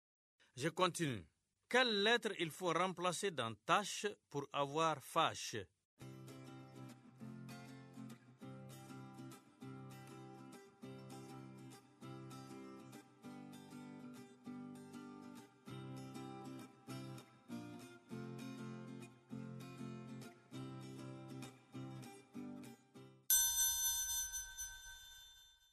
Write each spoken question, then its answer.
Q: Quelle lettre il faut remplacer dans tâche pour avoir fâche?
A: Monsieur, c'est la lettre T.